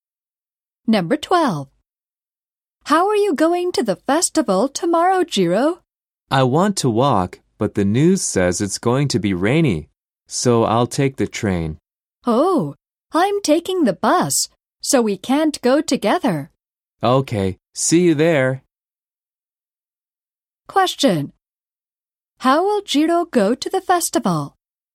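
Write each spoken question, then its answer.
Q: How will Jiro go to the festival?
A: By train.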